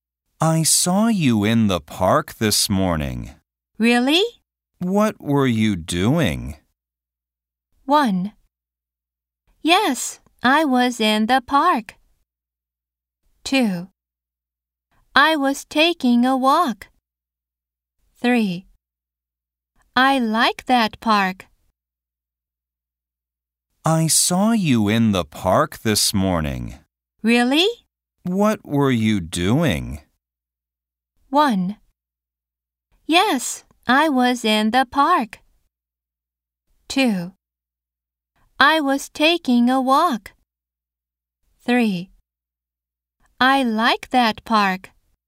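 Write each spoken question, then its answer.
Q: What were you doing?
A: 2: I was taking a walk.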